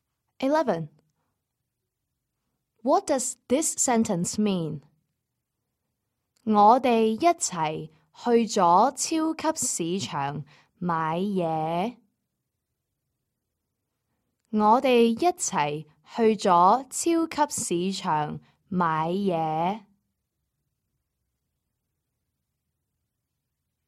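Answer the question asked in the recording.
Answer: We went to the supermarket together to shop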